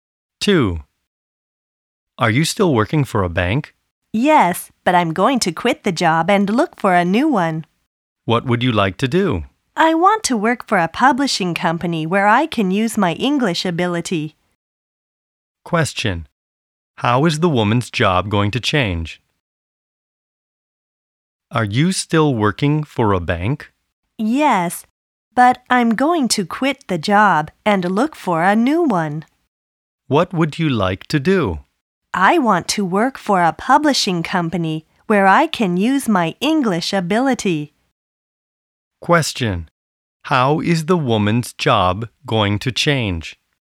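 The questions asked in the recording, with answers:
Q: How is the woman's job going to change?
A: She will quit the bank and work for a publishing company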